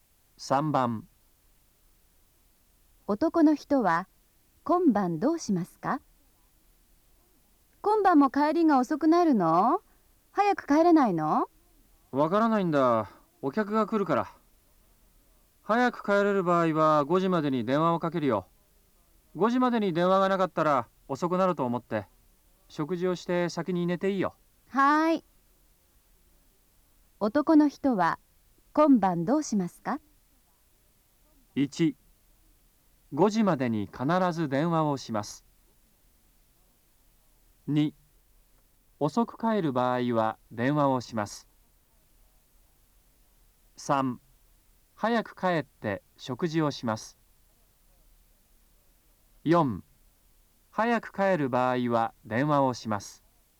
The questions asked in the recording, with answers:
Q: 男の人は今晩どうしますか?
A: 3番、4